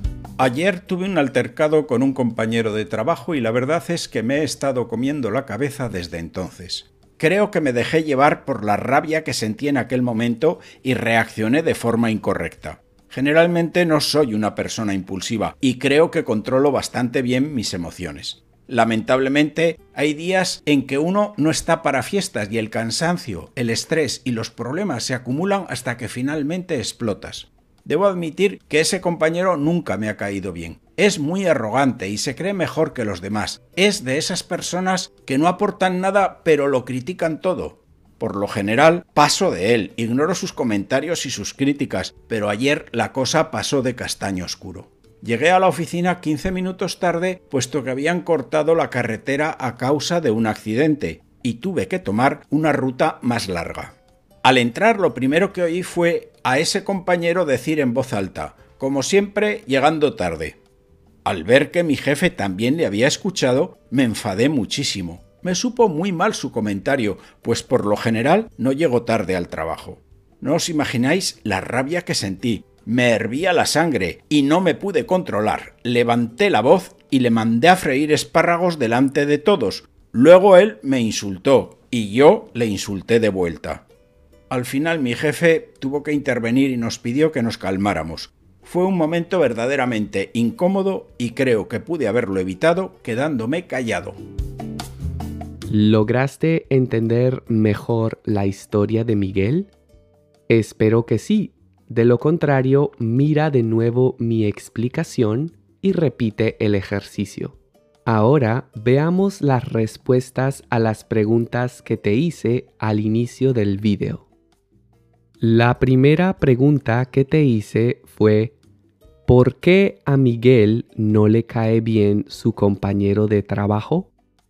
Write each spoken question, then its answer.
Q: ¿por qué a Miguel no le cae bien su compañero de trabajo?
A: porque es muy arrogante y se cree mejor que los demás, y porque es de esas personas que no aportan nada pero lo critican todo.